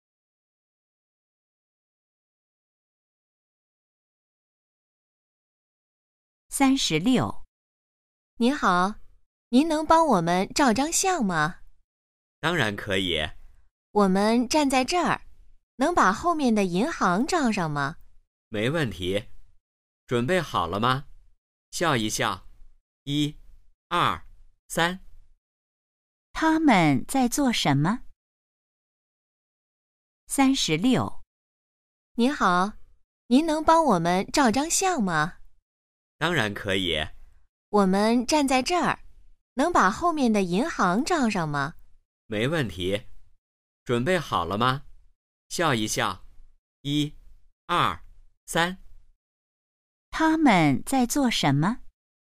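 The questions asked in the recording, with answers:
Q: 他们在做什么?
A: 照相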